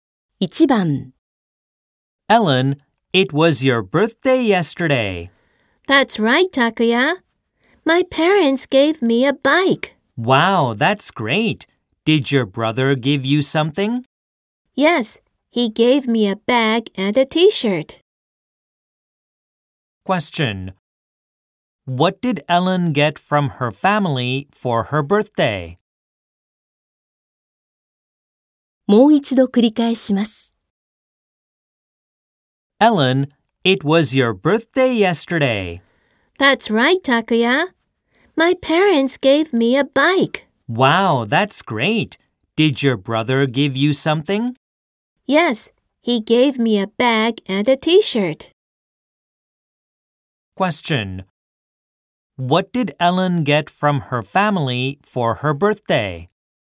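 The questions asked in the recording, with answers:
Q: What did Ellen get from her family for her birthday?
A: A bike, a bag and a T-shirt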